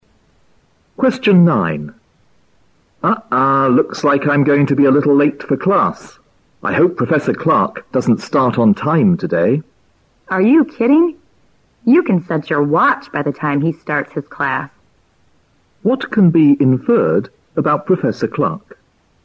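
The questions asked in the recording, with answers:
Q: What can be inferred about Professor Clark?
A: He always starts his class on time.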